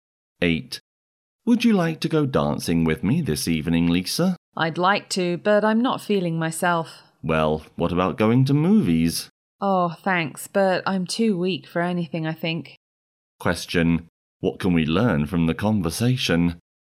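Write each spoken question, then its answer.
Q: What can we learn from the conversation?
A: Lisa isn't feeling well.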